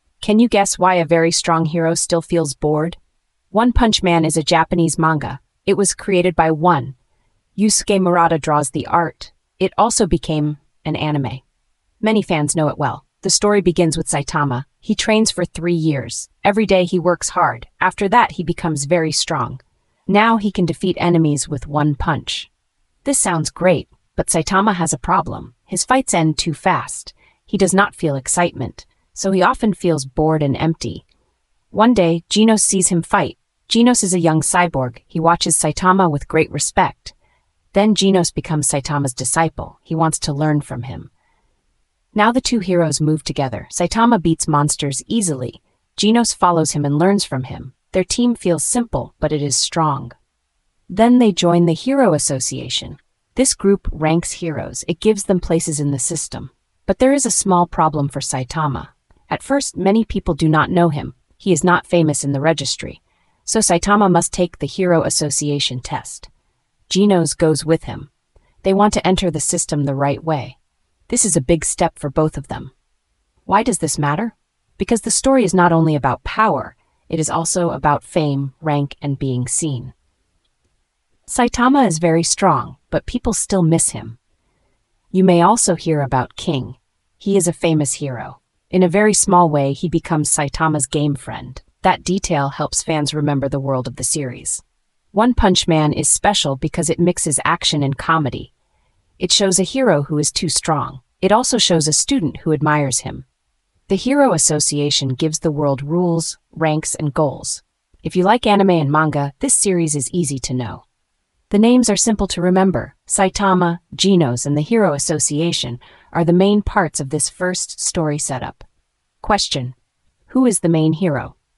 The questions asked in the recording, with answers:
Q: Who is the main hero?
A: Saitama is the main hero.